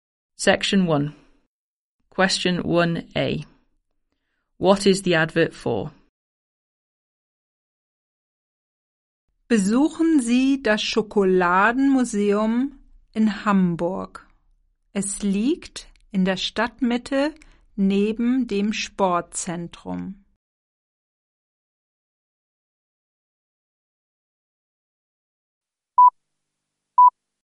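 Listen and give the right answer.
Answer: The chocolate museum in Hamburg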